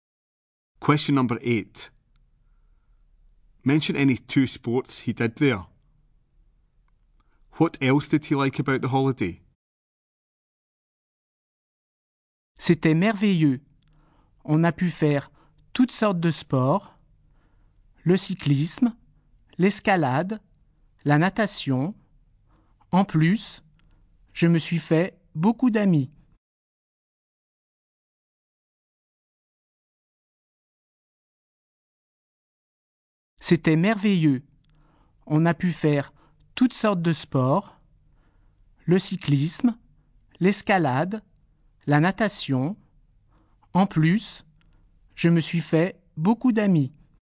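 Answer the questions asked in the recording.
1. Any two of cycling, climbing, swimming
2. He made lots of friends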